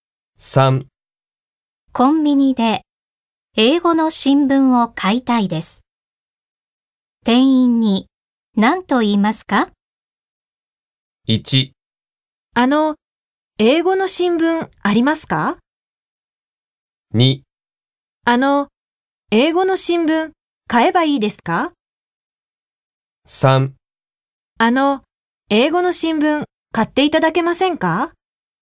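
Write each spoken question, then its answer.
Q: コンビニで英語の新聞を買いたいです。店員に何と言いますか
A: 1: あの、英語の新聞ありますか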